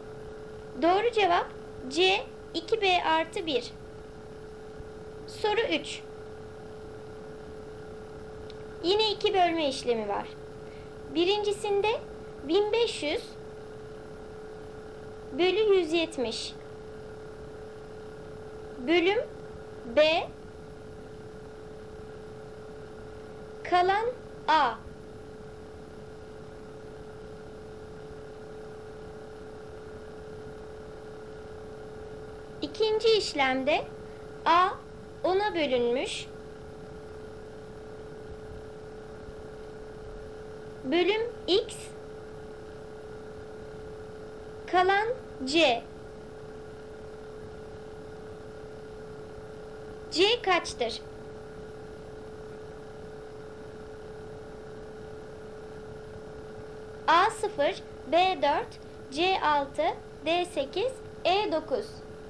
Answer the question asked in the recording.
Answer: Doğru cevap A 0.